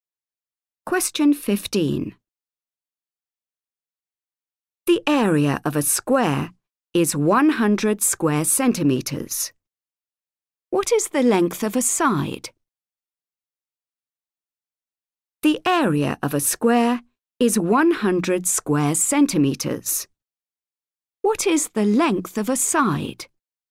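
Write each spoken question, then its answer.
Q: What is the length of a side?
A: 10 centimetres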